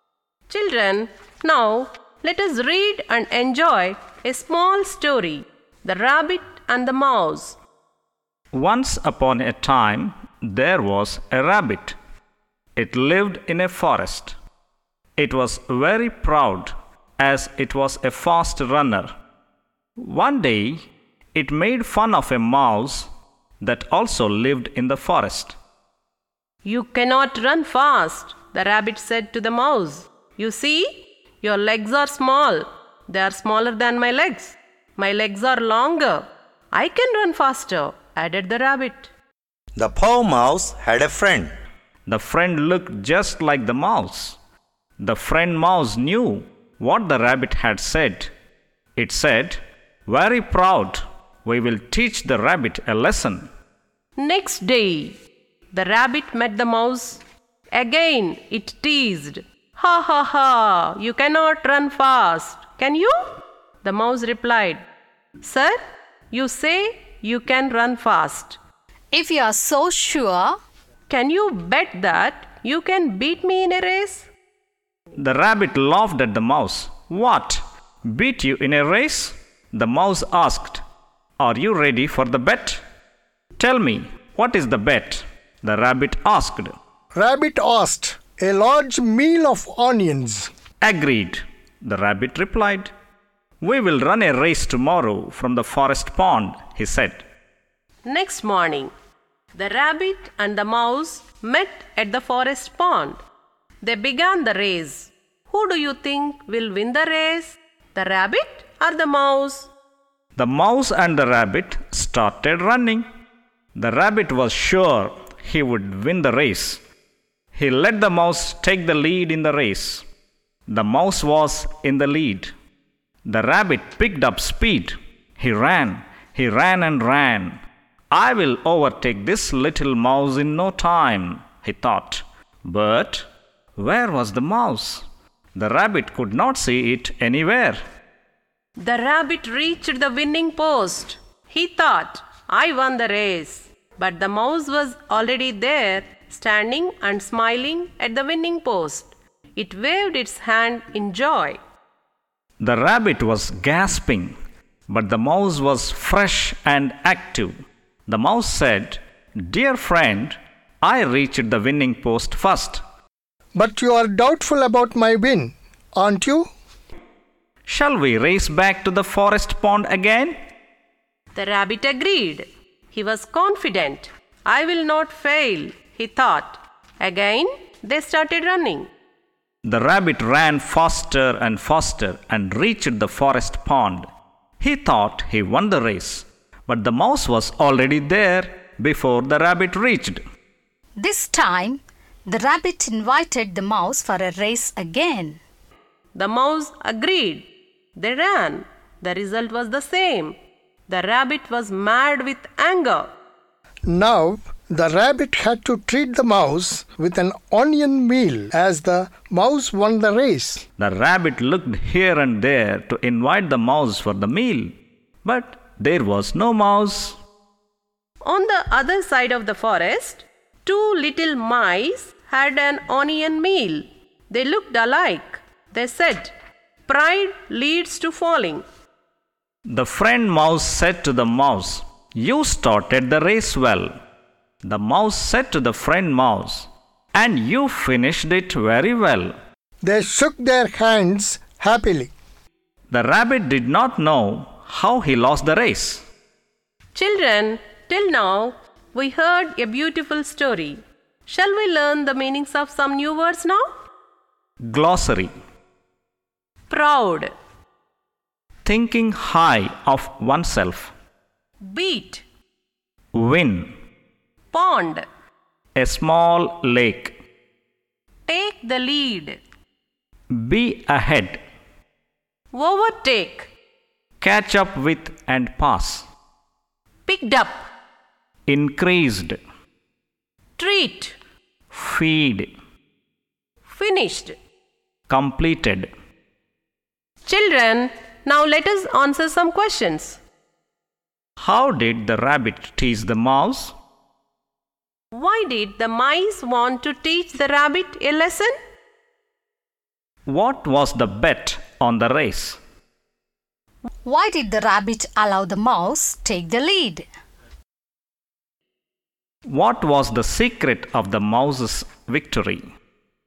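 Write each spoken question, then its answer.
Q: Why did the mice want to teach the rabbit a lesson?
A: Because the rabbit was very proud and made fun of the mouse

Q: What was the bet on the race?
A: A large meal of onions

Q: Why did the rabbit allow the mouse take the lead?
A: He was sure he would win the race

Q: What was the secret of the mouse's victory?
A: Its friend mouse looked just like it and was already waiting at the finish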